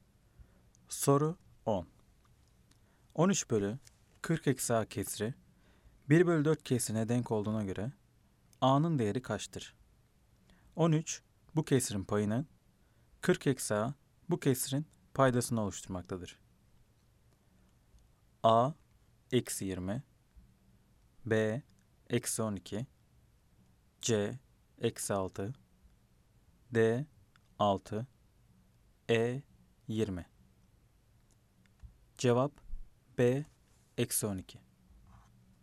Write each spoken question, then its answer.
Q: 13 bölü 40 eksi a kesri 1 bölü 4 kesrine denk olduğuna göre a'nın değeri kaçtır?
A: Cevap B eksi 12.